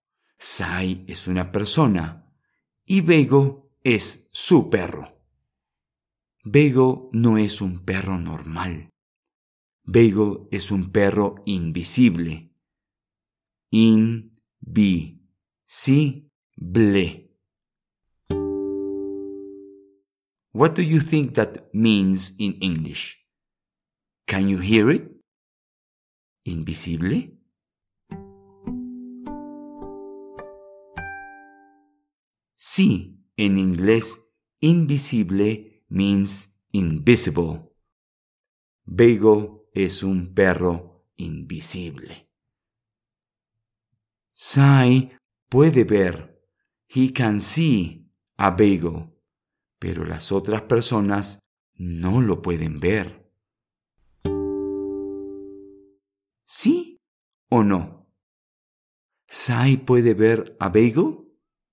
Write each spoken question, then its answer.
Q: ¿Sí o no? ¿Sai puede ver a Bagel?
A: Sí, Sai puede ver a Beigo, pero las otras personas no lo pueden ver.